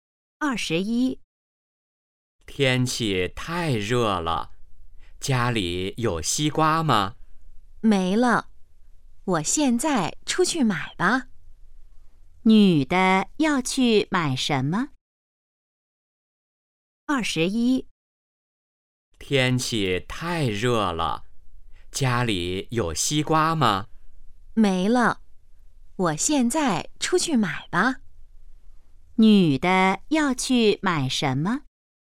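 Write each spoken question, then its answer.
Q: 女的要去买什么?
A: 西瓜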